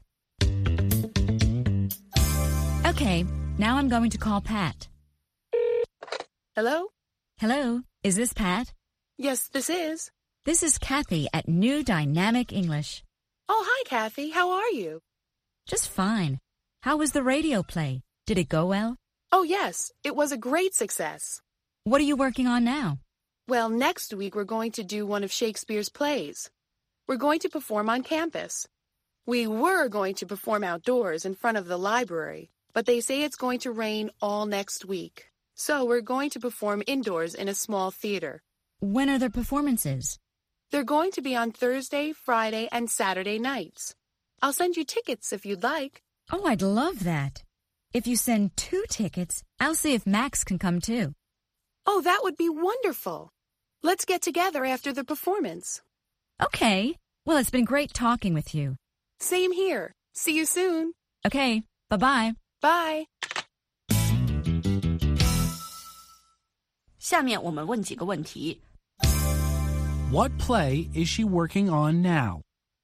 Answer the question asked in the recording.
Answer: She's working on a play by Shakespeare.